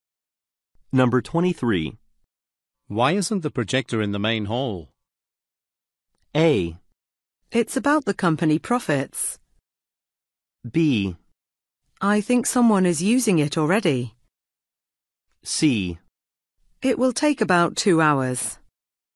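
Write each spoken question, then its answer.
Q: Why isn't the projector in the main hall?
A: B: I think someone is using it already.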